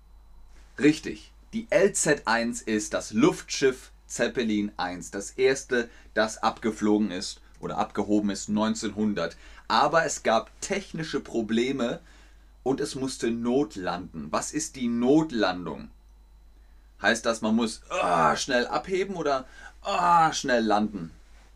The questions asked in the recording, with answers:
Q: Was ist die Notlandung? Heißt das, man muss oh, schnell abheben oder oh, schnell landen?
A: Genau, Notlandung. Man muss schnell runterkommen.